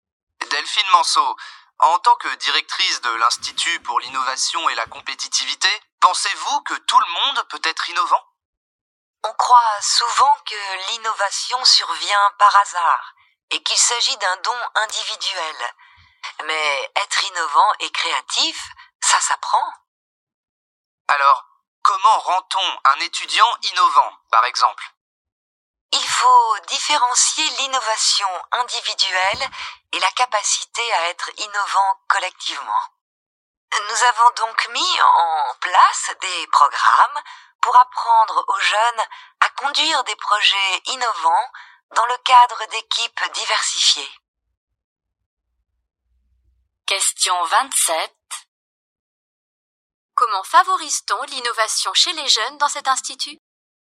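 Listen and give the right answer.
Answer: Par des programmes de projets innovants en équipes diversifiées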